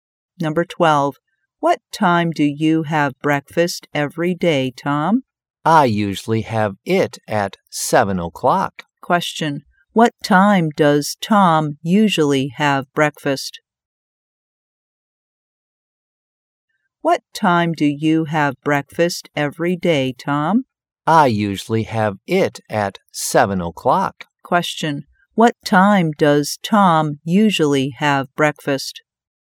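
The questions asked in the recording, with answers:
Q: What time does Tom usually have breakfast?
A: At 7 o'clock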